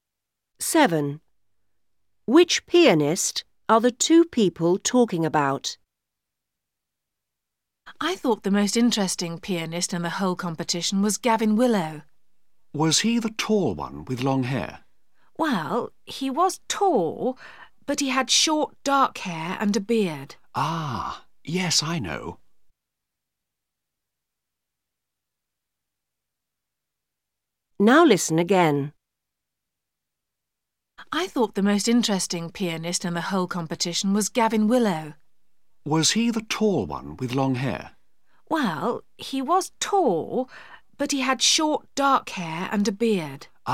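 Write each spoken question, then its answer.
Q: Which pianist are the two people talking about?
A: The tall one with short dark hair and a beard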